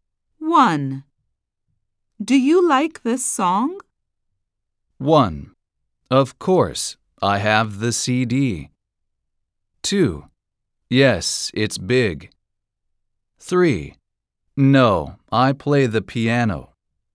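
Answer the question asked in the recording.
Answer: 1: Of course, I have the CD.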